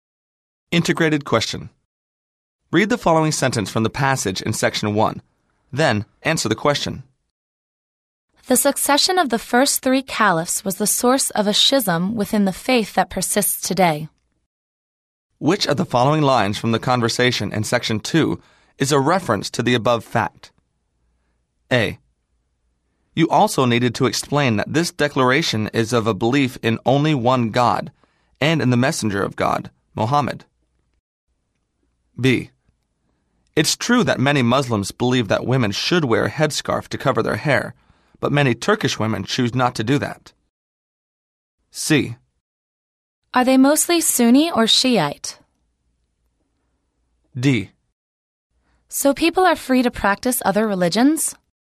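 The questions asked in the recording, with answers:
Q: Which of the following lines from the conversation in section 2 is a reference to the above fact?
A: C: Are they mostly Sunni or Shiite?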